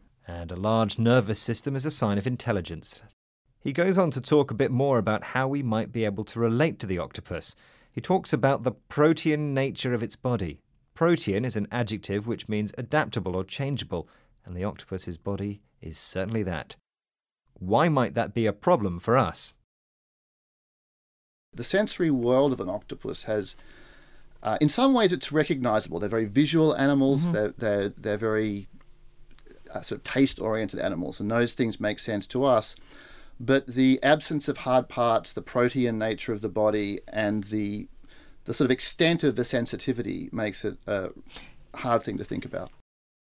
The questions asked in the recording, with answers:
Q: Why might that be a problem for us?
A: But what's tricky for us is that its form is so completely different from ours.